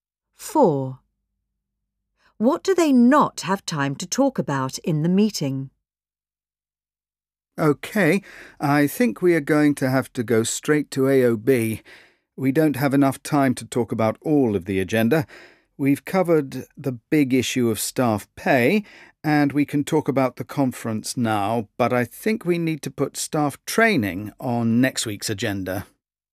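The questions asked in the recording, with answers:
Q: What do they not have time to talk about in the meeting?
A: staff training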